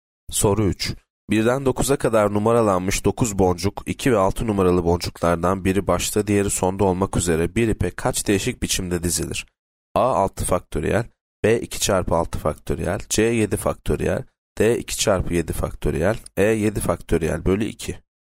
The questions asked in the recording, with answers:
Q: 1'den 9'a kadar numaralanmış 9 boncuk 2 ve 6 numaralı boncuklardan biri başta diğeri sonda olmak üzere bir ipe kaç değişik biçimde dizilir?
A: Yanıt D 2 çarpı 7 faktöriyel.